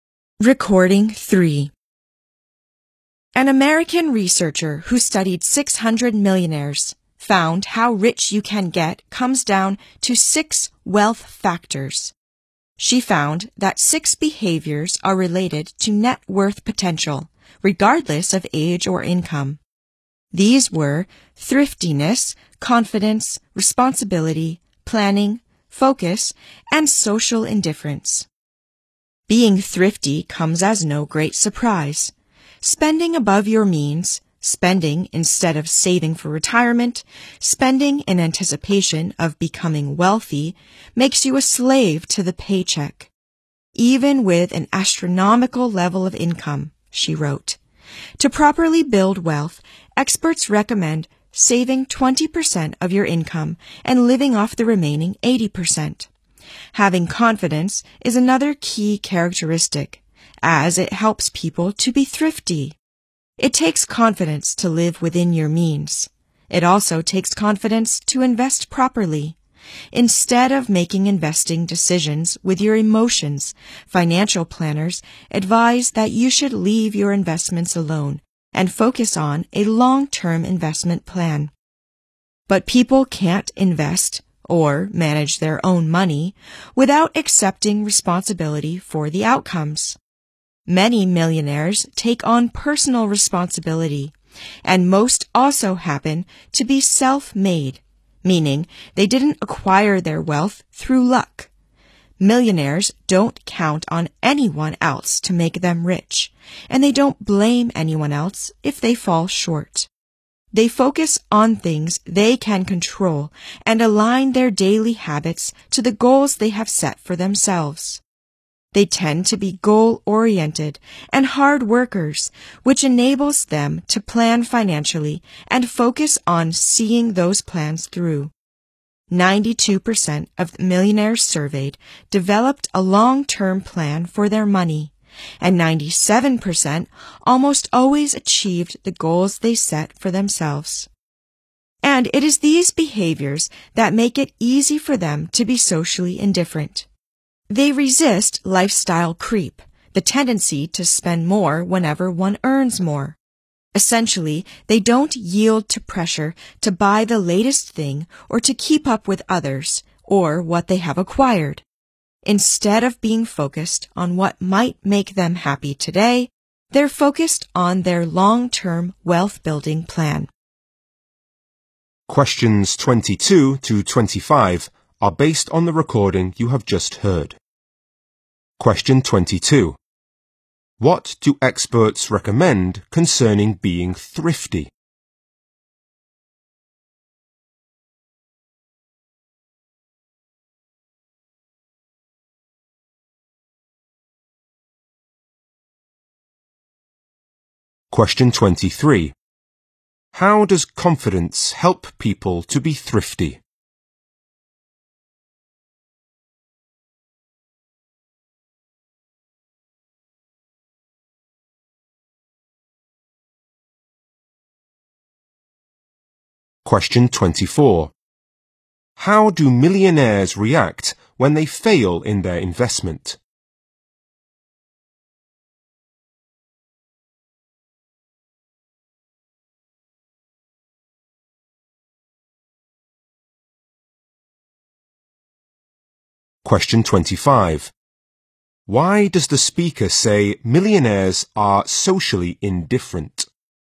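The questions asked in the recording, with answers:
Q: What do experts recommend concerning being thrifty?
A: Save 20% of your income and live off the remaining 80%.

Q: How does confidence help people to be thrifty?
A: It helps them live within their means and invest properly.

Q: How do millionaires react when they fail in their investment?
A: They don't blame anyone else and take personal responsibility.

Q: Why does the speaker say millionaires are socially indifferent?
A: They don't yield to pressure to buy the latest thing or keep up with others, focusing on long-term wealth.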